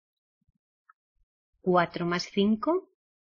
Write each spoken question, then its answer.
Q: ¿Cuatro más cinco?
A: Nine.